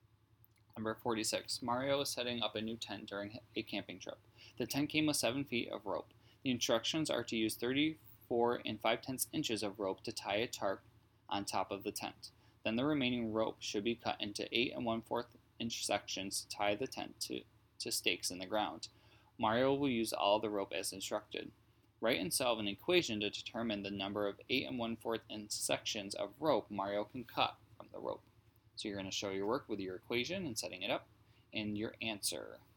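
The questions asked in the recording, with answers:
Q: Write and solve an equation to determine the number of 8 1/4 inch sections of rope Mario can cut from the rope.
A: (84 - 34 5/10) ÷ 8 1/4 = 6 sections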